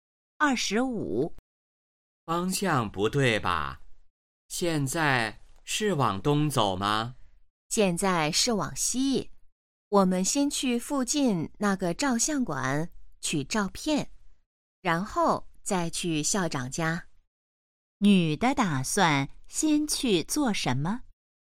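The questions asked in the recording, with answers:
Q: 女的打算先去做什么?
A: 去照相馆取照片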